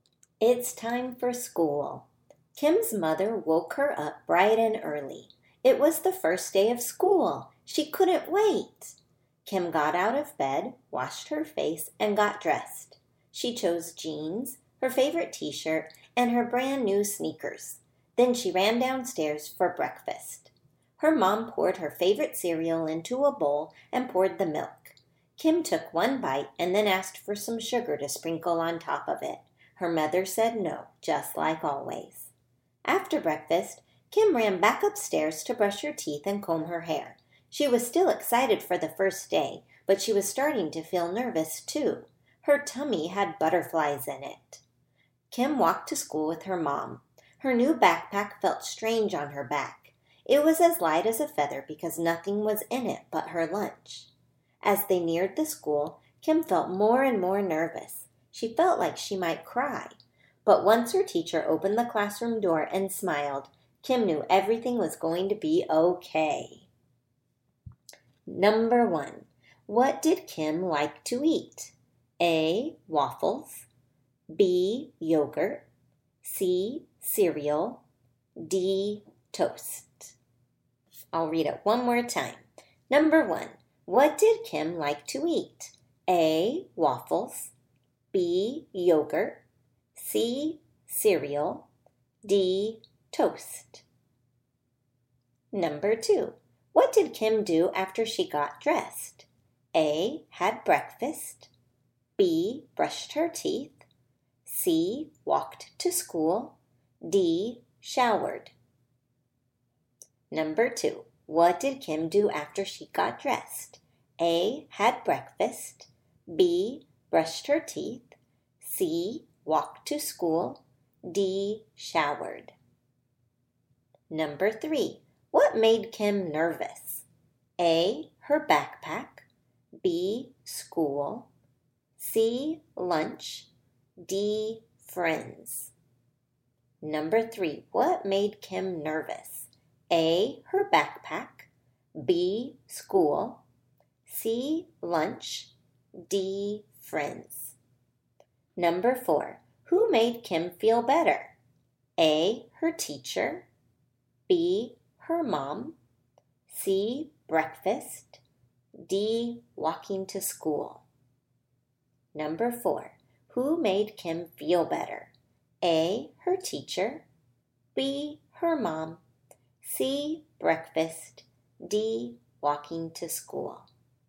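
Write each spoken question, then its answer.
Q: What did Kim like to eat?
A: C: Cereal

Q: What did Kim do after she got dressed?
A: A: Had breakfast

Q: What made Kim nervous?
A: B: School

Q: Who made Kim feel better?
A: A: Her teacher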